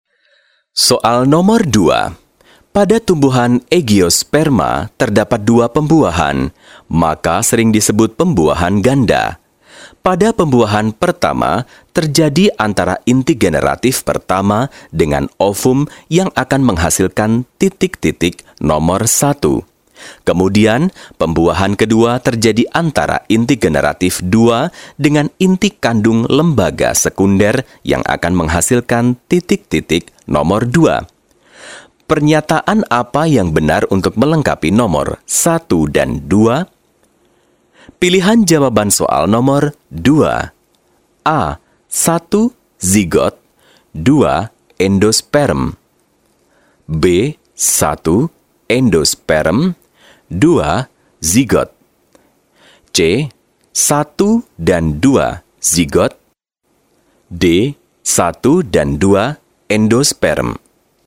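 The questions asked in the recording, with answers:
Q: Pernyataan apa yang benar untuk melengkapi nomor 1 dan 2?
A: A: 1. Zigot. 2. Endosperm.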